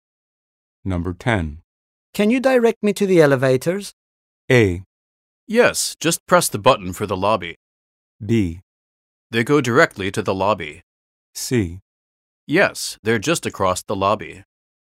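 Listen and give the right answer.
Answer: C: Yes, they're just across the lobby.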